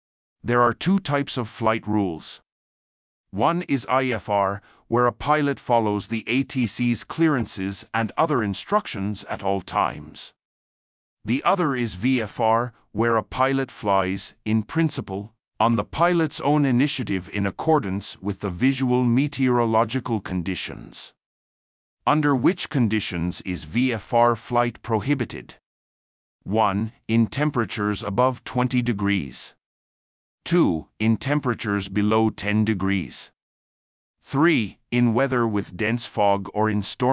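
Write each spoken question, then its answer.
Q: Under which conditions is VFR flight prohibited?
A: 3: In weather with dense fog or in storm.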